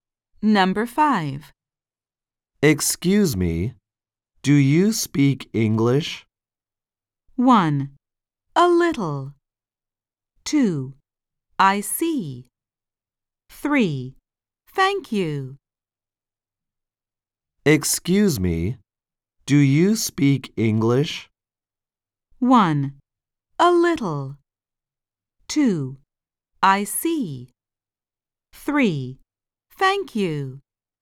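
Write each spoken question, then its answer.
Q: Excuse me, do you speak English?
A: 1: A little.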